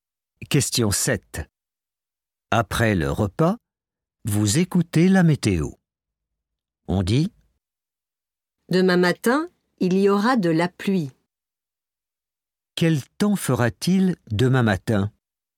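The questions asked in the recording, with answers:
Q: Quel temps fera-t-il demain matin ?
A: de la pluie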